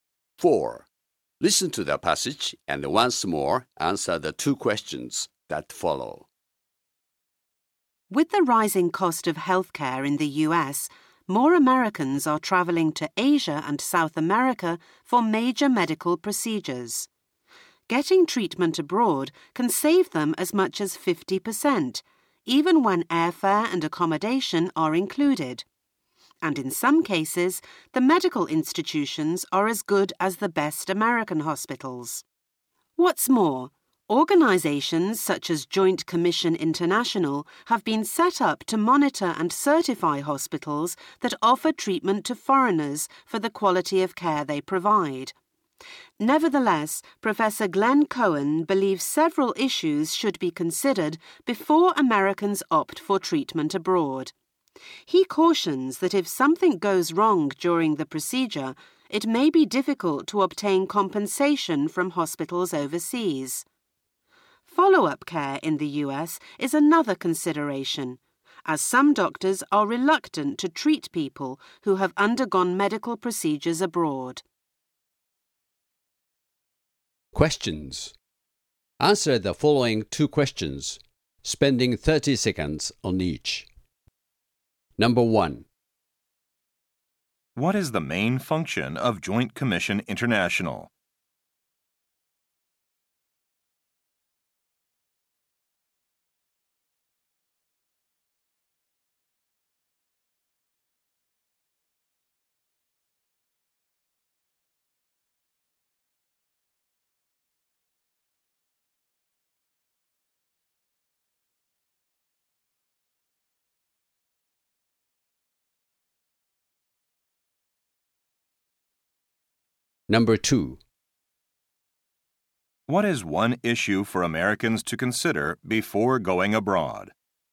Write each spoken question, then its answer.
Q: What is the main function of Joint Commission International?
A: This group monitors and provides certification related to the quality of patient care at hospitals offering services to foreigners.

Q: What is one issue for Americans to consider before going abroad?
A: They should consider the possible difficulty in obtaining compensation if a mistake is made.